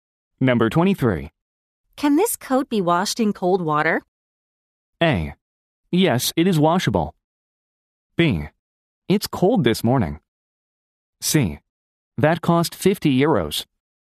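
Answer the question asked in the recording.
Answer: A: Yes, it is washable.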